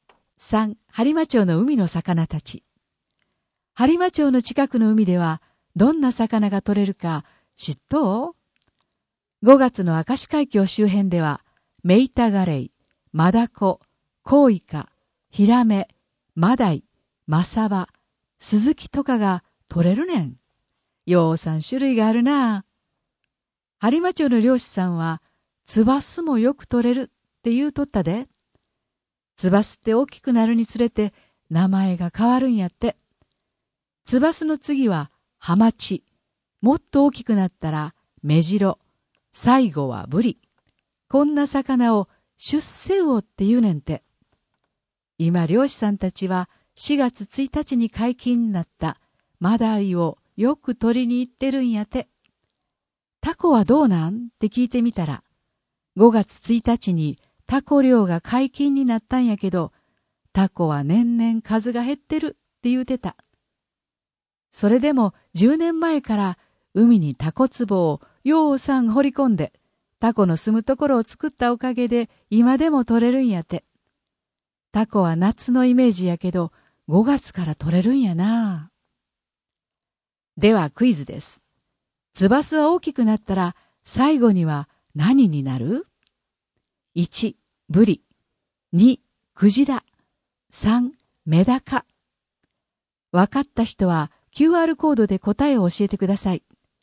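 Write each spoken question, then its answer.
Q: ツバスは大きくなったら最後には何になる?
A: 1: ブリ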